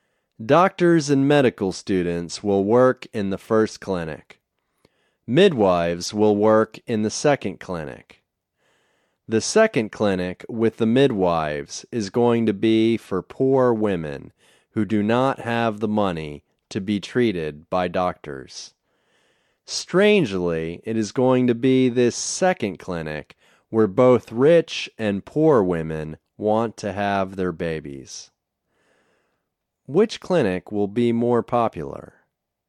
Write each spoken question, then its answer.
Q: Which clinic will be more popular?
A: The second clinic will be more popular.